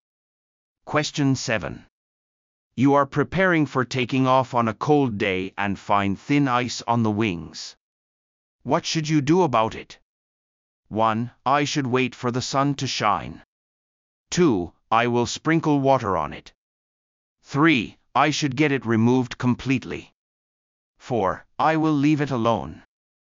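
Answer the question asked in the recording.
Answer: 3: I should get it removed completely.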